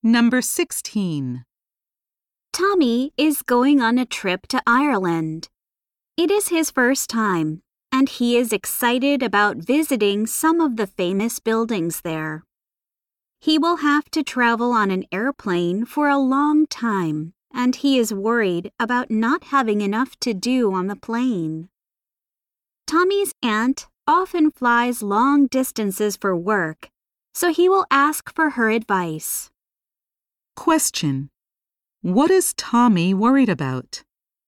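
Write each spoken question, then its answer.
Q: What is Tommy worried about?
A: Not having enough to do on the long plane trip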